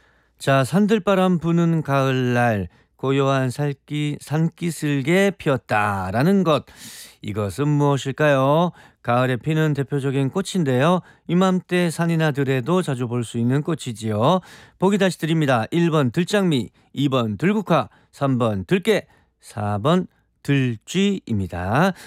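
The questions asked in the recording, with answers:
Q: 이것은 무엇일까요?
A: 2번: 들국화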